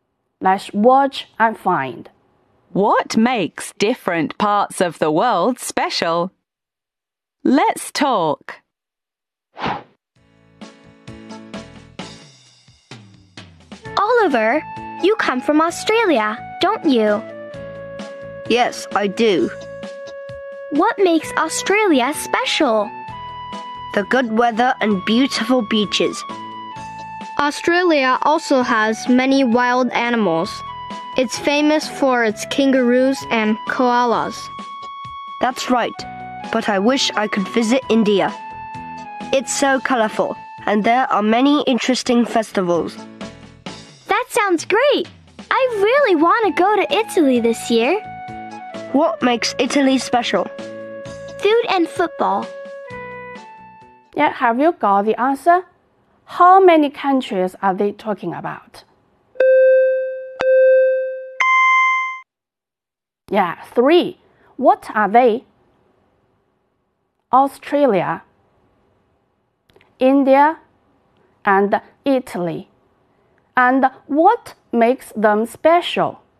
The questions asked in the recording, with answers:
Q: How many countries are they talking about?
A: Yeah, three. What are they?